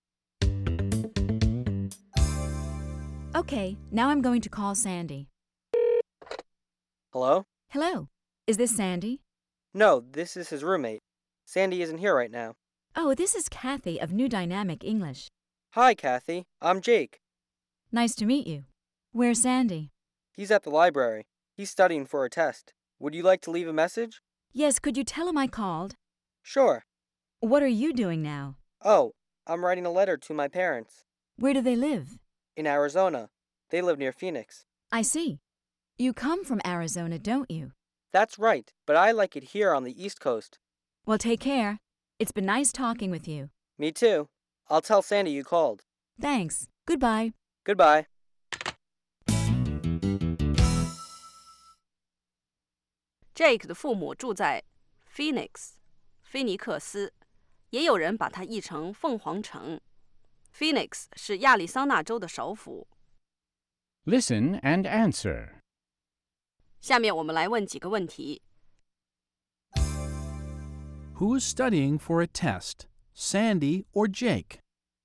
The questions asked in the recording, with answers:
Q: Who's studying for a test, Sandy or Jake?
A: Sandy is.